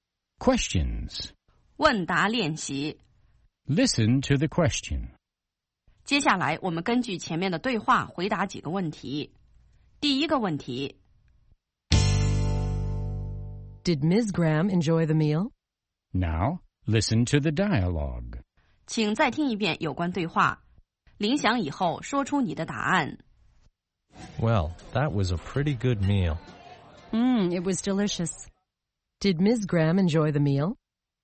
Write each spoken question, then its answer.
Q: Did Ms. Graham enjoy the meal?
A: Yes, she did. She thought it was delicious.